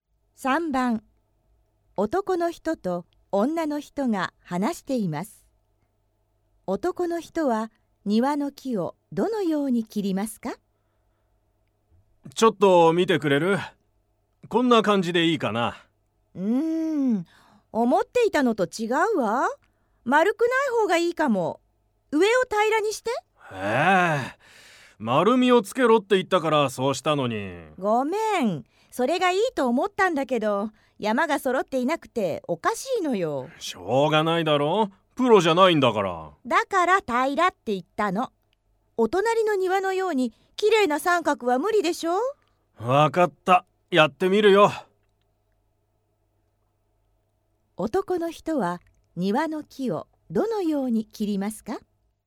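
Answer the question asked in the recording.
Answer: 上を平らにする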